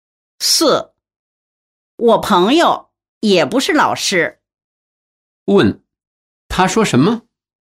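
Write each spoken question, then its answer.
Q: 他说什么?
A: 他朋友也不是老师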